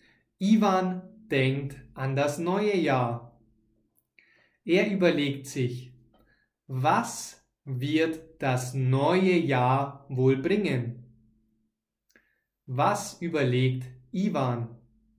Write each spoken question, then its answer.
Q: Was überlegt Ivan?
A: Er überlegt, was wird das neue Jahr wohl bringen?